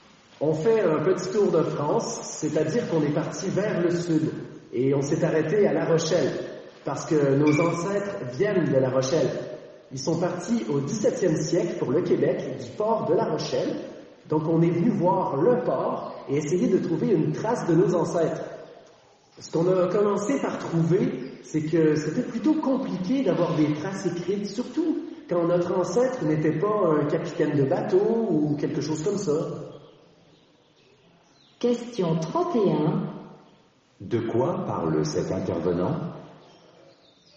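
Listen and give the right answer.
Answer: De son voyage à La Rochelle pour chercher des traces de ses ancêtres partis au Québec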